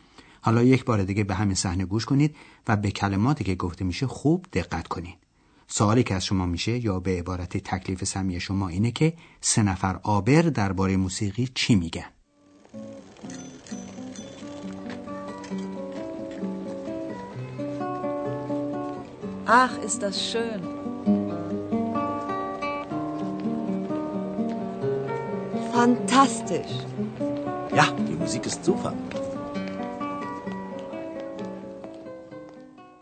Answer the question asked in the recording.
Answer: هر سه آبر از موسیقی که شنیدن خوششون اومد